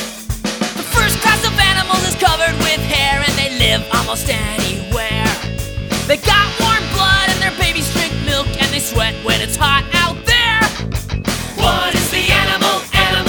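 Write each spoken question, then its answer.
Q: What is the animal?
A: Mammals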